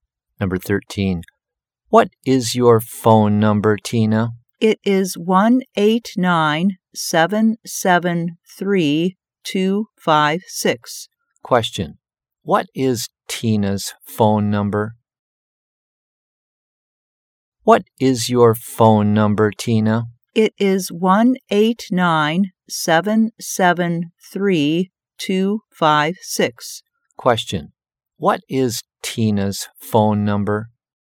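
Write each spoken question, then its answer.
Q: What is Tina's phone number?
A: 1-879-773-256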